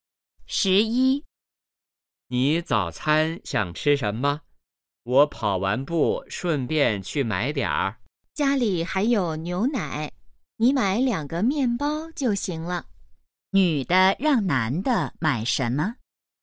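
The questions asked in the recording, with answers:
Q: 女的让男的买什么?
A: 面包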